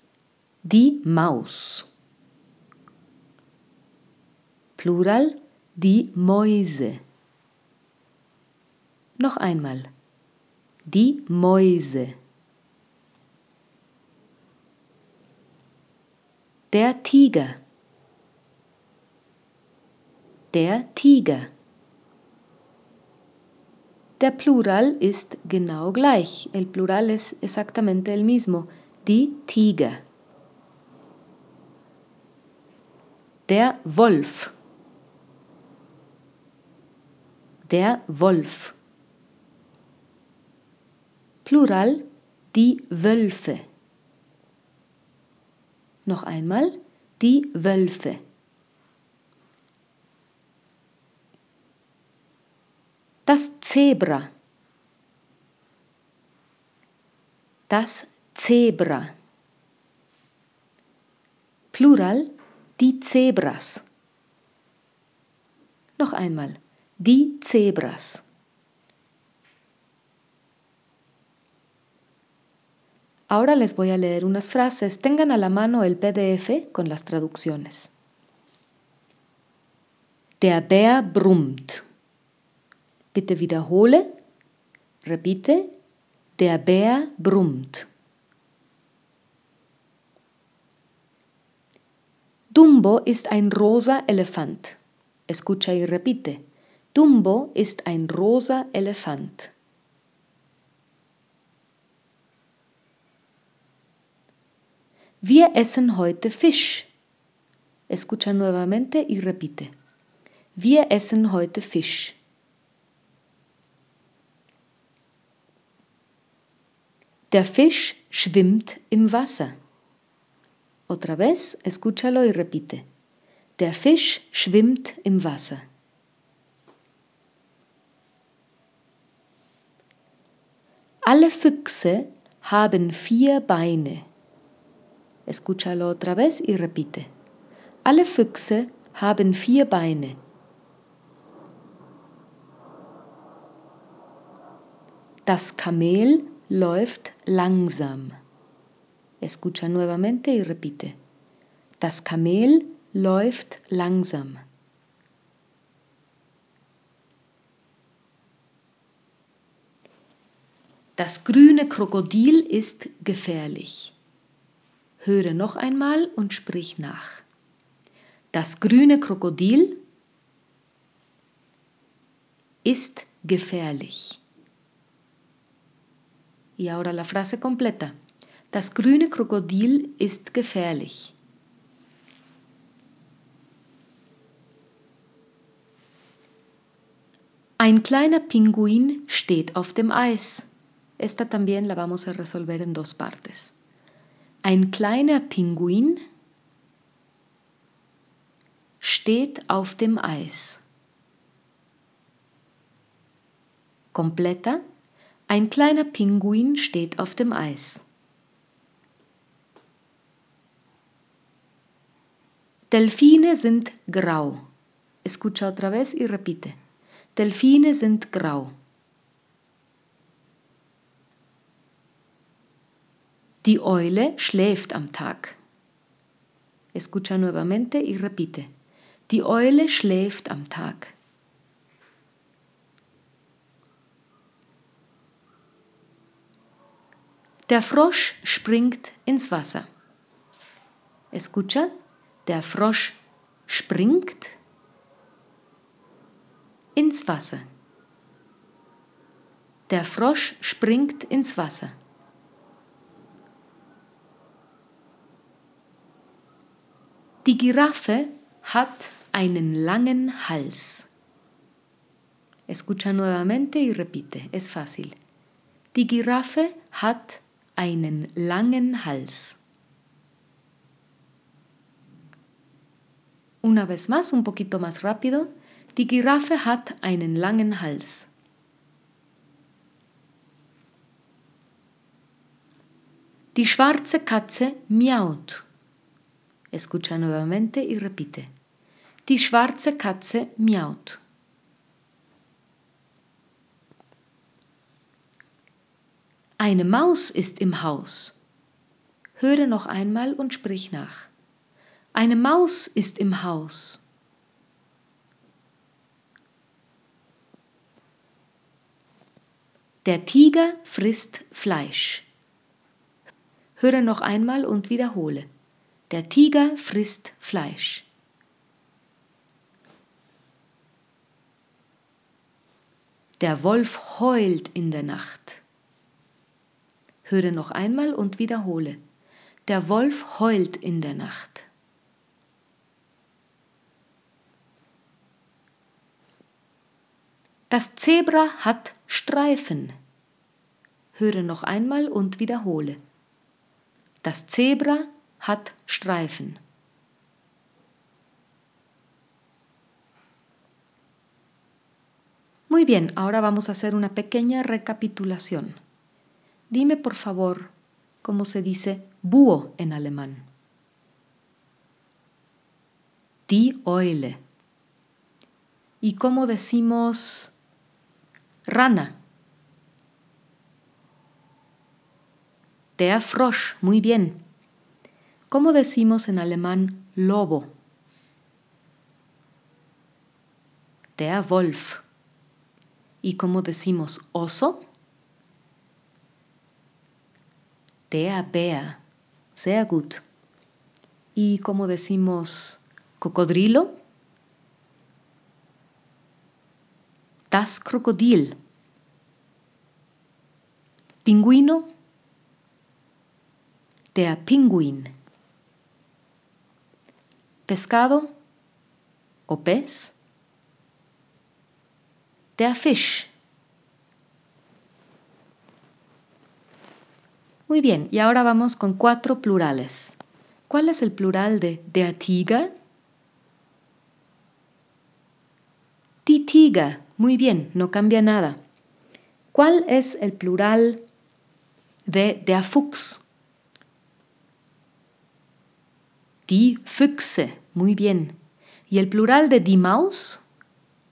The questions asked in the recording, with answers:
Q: ¿Y el plural de die Maus?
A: Die Mäuse.